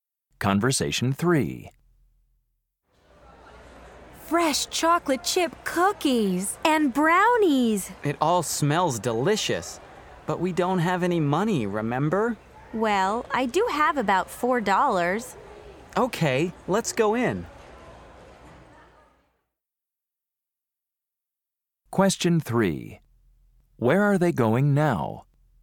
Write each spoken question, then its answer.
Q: Where are they going now?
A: Wow, what a great bakery.